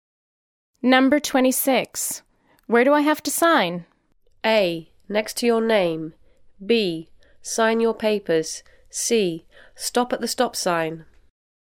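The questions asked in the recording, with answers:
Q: Where do I have to sign?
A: A: Next to your name.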